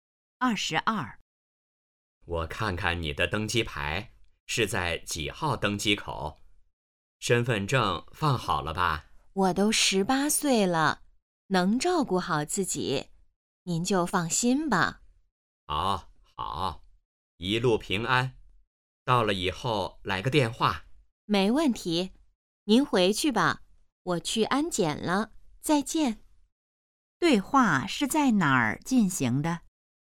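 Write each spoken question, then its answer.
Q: 对话是在哪儿进行的?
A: 机场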